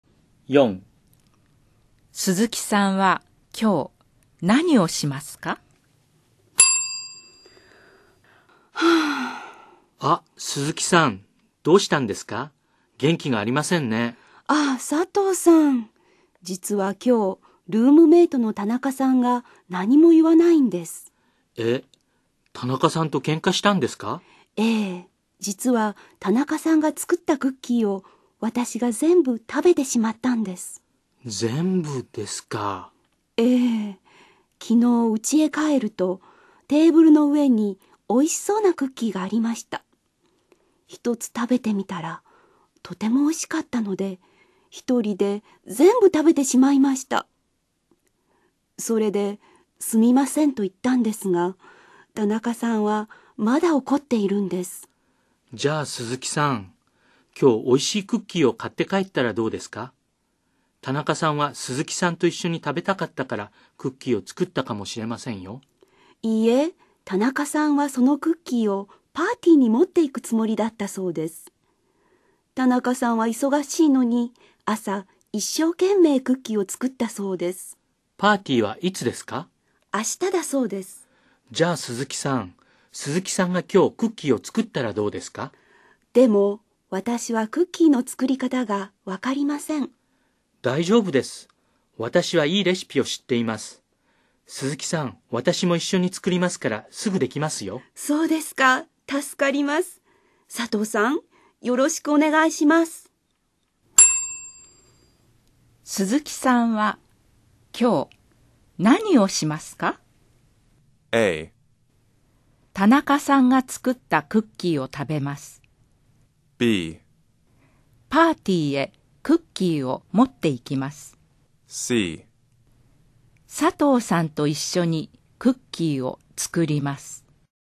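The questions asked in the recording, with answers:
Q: 鈴木さんは今日何をしますか?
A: C: 佐藤さんと一緒にクッキーを作ります。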